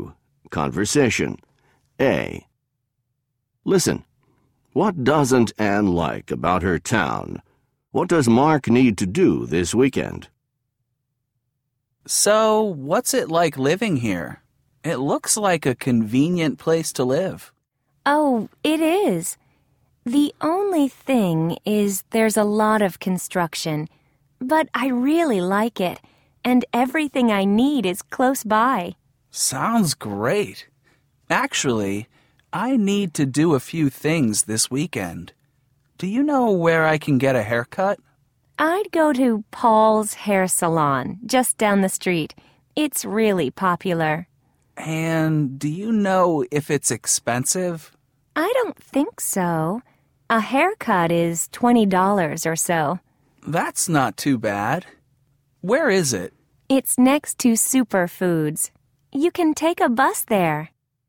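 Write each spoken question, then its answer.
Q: What doesn't Anne like about her town?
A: There's a lot of construction

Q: What does Mark need to do this weekend?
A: Get a haircut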